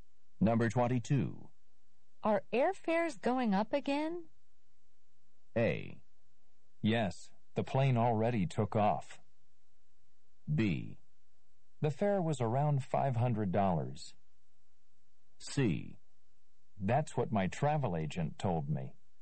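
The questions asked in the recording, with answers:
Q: Are airfares going up again?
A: C: That's what my travel agent told me.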